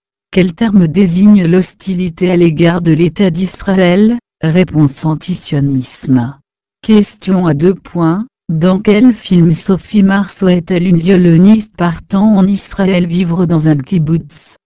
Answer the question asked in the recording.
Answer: Pour Sacha